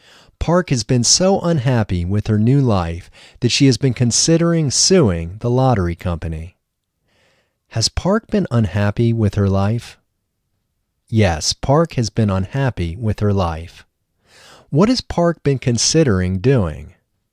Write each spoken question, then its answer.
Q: What has Park been considering doing?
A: Park has been considering suing the lottery company.